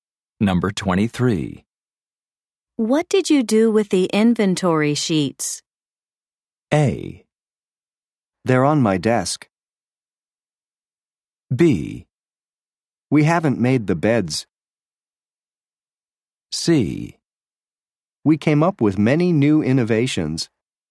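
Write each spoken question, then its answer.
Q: What did you do with the inventory sheets?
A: A: They're on my desk.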